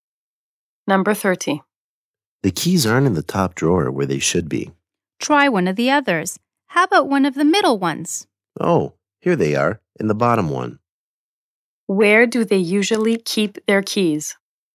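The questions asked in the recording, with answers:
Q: Where do they usually keep their keys?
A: In the top drawer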